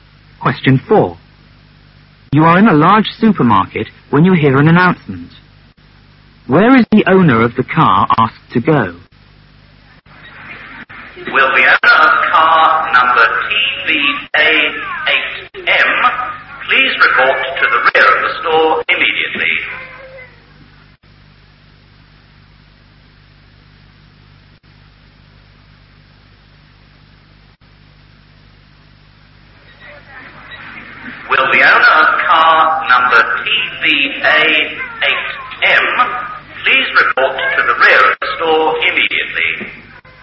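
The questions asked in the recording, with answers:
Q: Where is the owner of the car asked to go?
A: To the rear of the store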